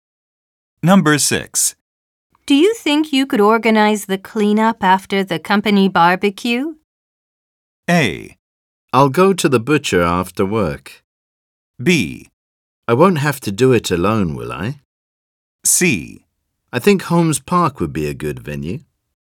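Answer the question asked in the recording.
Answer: B: I won't have to do it alone, will I?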